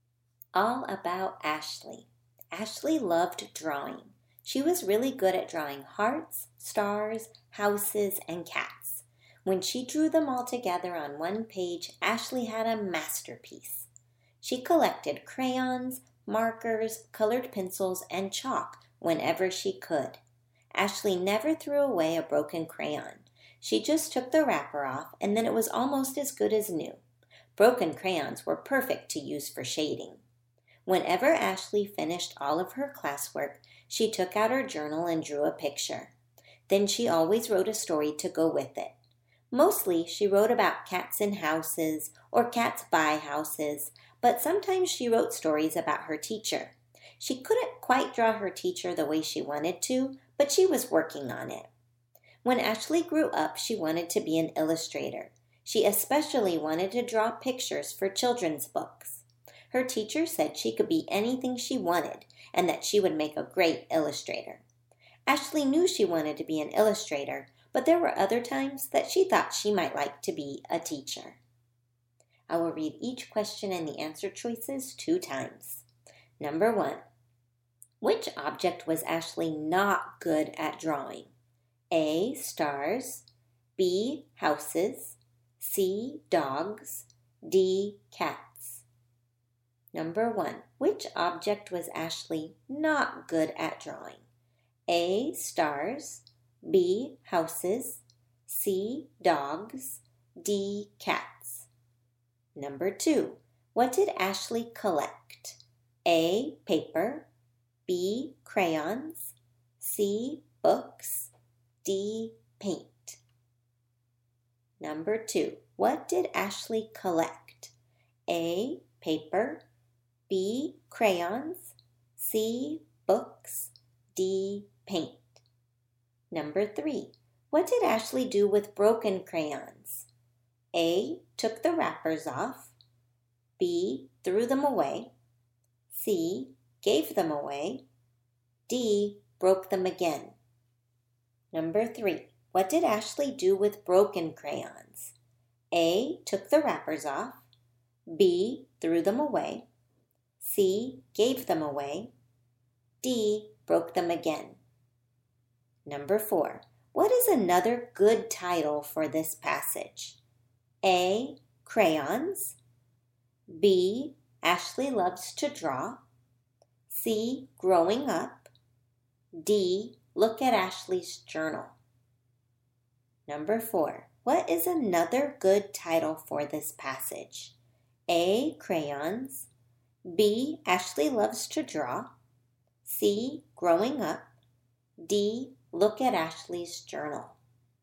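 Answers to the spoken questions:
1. C: dogs
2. B: crayons
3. A: took the wrappers off
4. B: Ashley loves to draw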